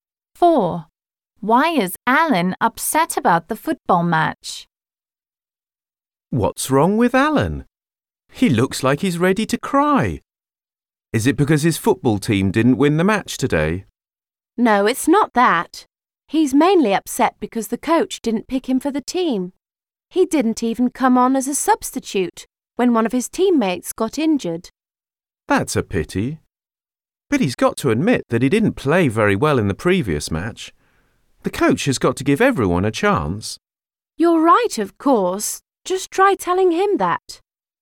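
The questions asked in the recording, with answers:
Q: Why is Alan upset about the football match?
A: The coach didn't pick him for the team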